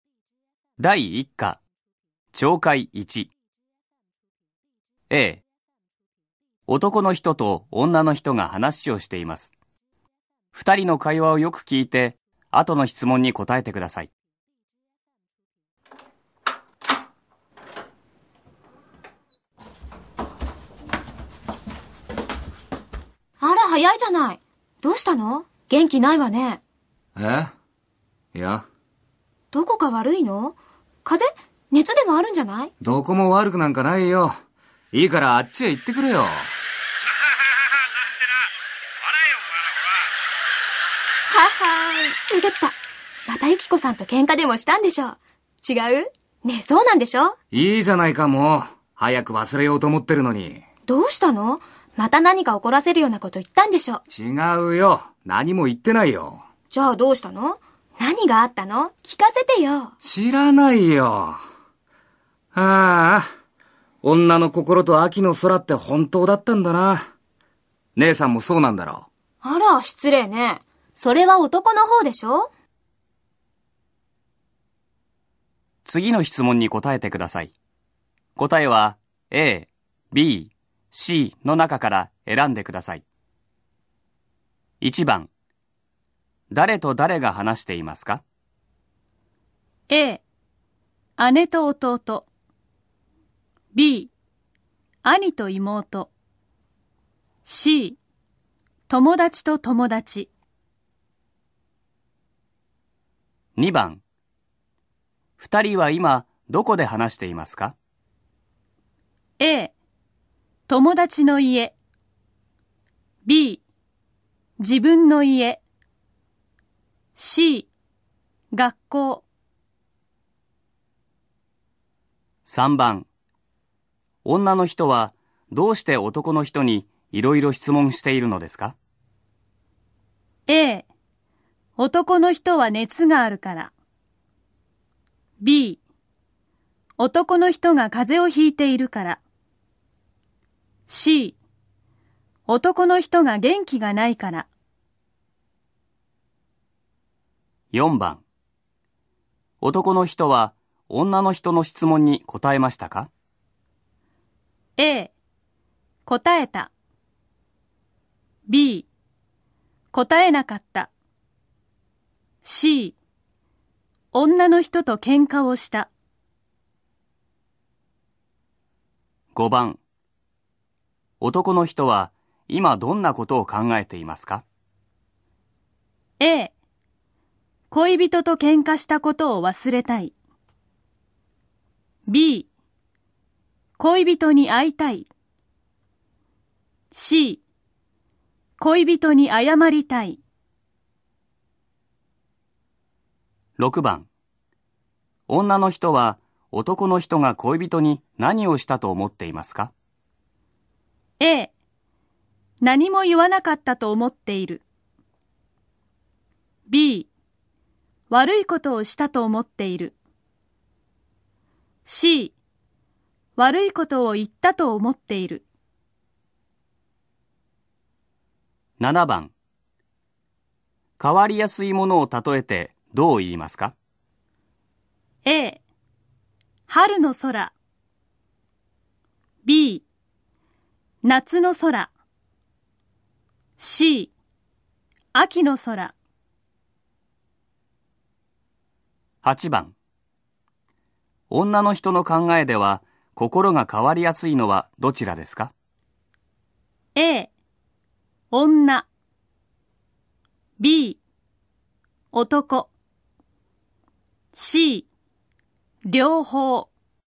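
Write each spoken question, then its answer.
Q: 誰と誰が話していますか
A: A: 姉と弟

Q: 女の人はどうして男の人にいろいろ質問しているのですか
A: C: 男の人が元気がないから

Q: 男の人は今どんなことを考えていますか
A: A: 恋人と喧嘩したことを忘れたい

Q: 女の人は男の人が恋人に何をしたと思っていますか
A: C: 悪いことを言ったと思っている

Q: 変わりやすいものを例えてどう言いますか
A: C: 秋の空

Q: 女の人の考えでは心が変わりやすいのはどちらですか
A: B: 男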